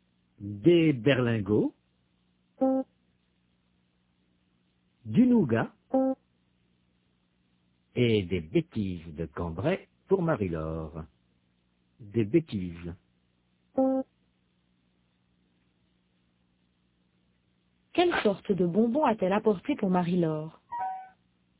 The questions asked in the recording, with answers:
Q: Quelle sorte de bonbons a-t-elle apporté pour Marie-Laure ?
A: Des bêtises de Cambrai.